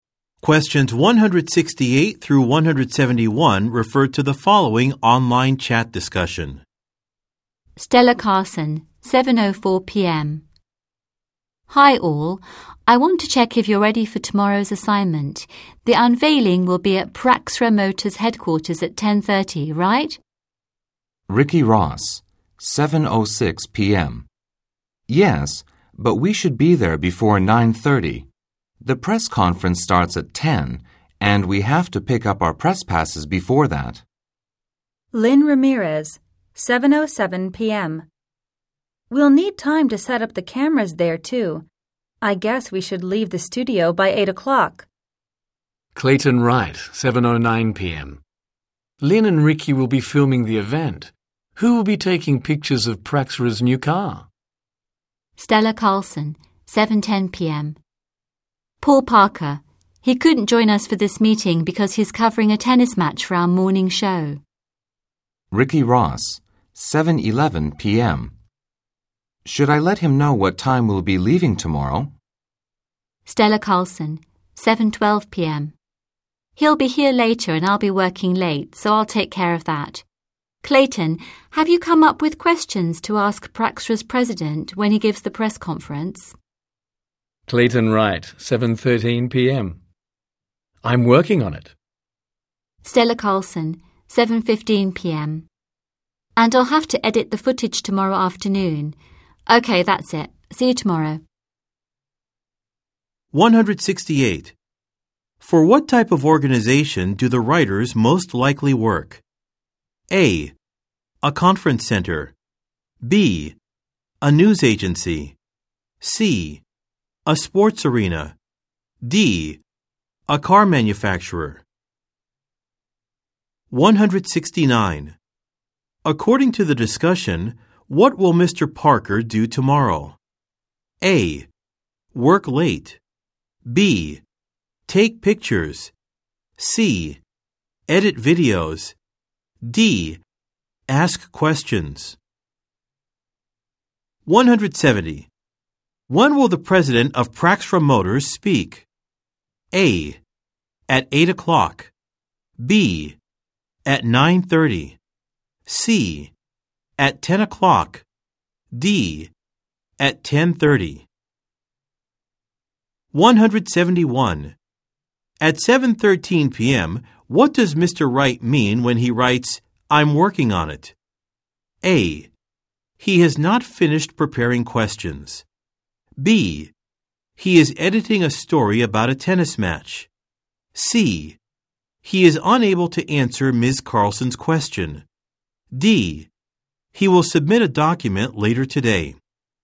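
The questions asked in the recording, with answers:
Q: For what type of organization do the writers most likely work?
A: B: A news agency.

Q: According to the discussion, what will Mr. Parker do tomorrow?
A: B: Take pictures.

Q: When will the president of Praxra Motors speak?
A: C: At 10 o'clock.

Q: At 7.13 p.m., what does Mr. Wright mean when he writes, I'm working on it?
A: A: He has not finished preparing questions.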